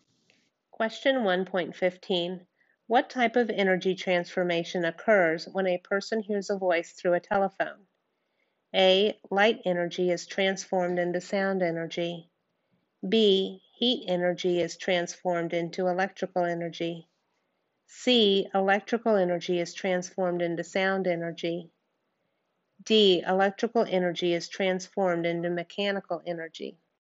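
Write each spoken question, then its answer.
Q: What type of energy transformation occurs when a person hears a voice through a telephone?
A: C: Electrical energy is transformed into sound energy.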